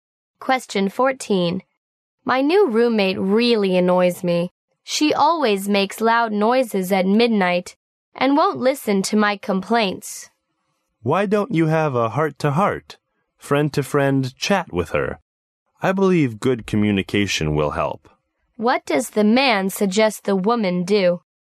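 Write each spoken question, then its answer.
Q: What does the man suggest the woman do?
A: Have a heart-to-heart talk with her roommate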